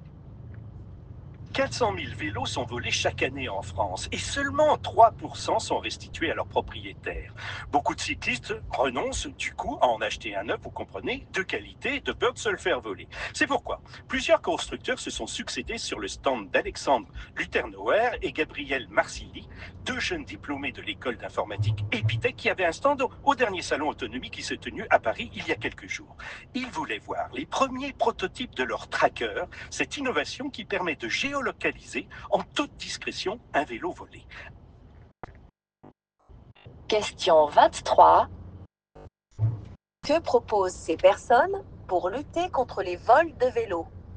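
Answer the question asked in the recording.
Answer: Un tracker qui permet de géolocaliser discrètement un vélo volé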